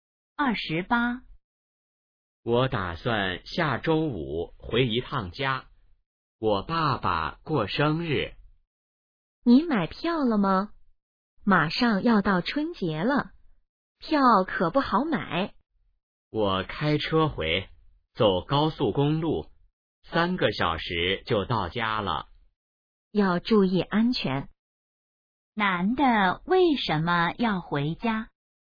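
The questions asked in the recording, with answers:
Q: 男的为什么要回家?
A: 爸爸过生日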